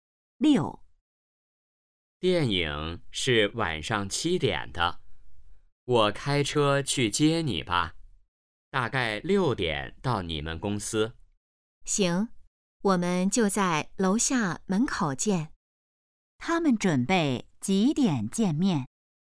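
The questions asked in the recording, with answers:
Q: 他们准备几点见面?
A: 6点左右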